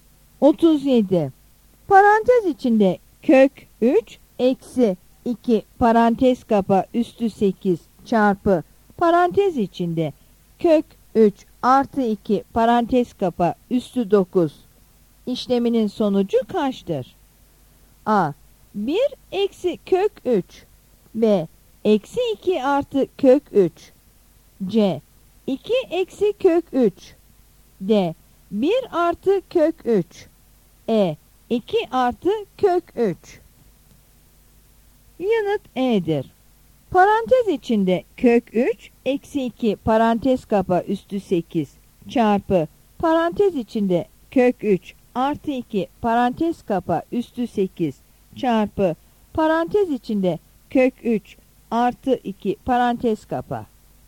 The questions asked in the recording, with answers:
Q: Parantez içinde kök 3 eksi 2 parantez kapa üstü 8 çarpı parantez içinde kök 3 artı 2 parantez kapa üstü 9 işleminin sonucu kaçtır?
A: Yanıt E'dir.